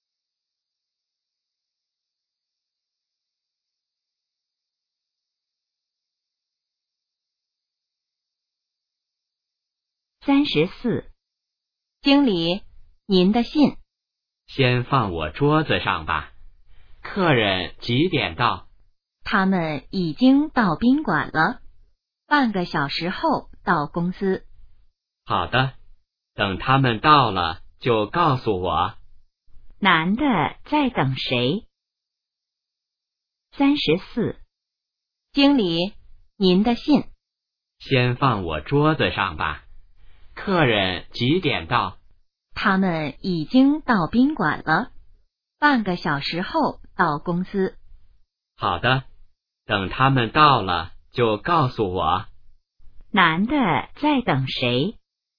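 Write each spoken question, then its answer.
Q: 男的在等谁?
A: 客人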